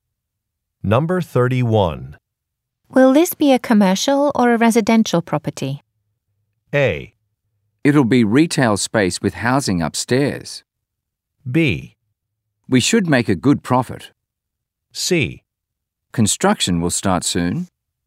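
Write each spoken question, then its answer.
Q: Will this be a commercial or a residential property?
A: A: It'll be retail space with housing upstairs.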